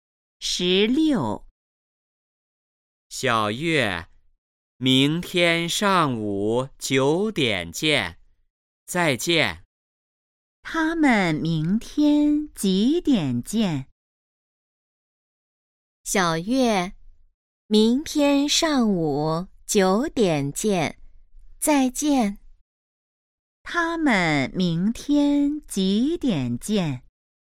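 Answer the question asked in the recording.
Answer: 上午九点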